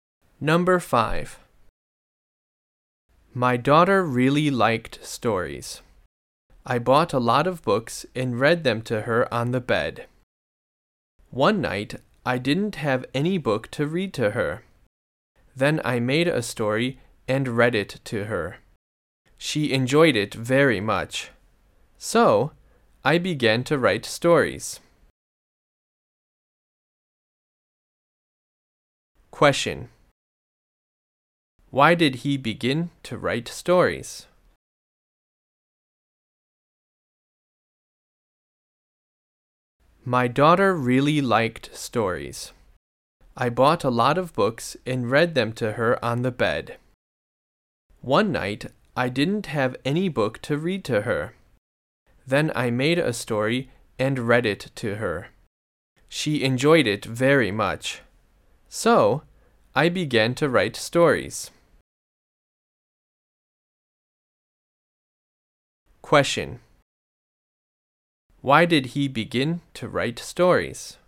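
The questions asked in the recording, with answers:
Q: Why did he begin to write stories?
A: Because his daughter enjoyed the story he made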